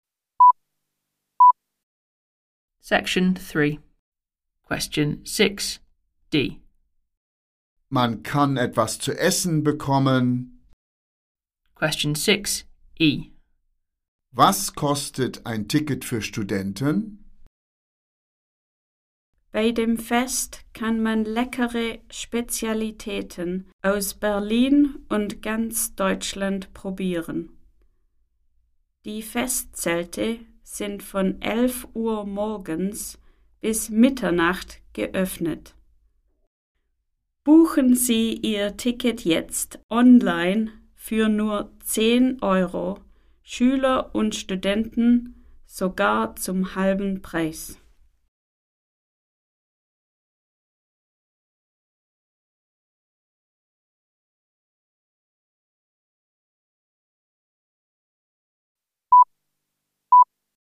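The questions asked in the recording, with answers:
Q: Was kostet ein Ticket für Studenten?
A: 5 Euro (halber Preis)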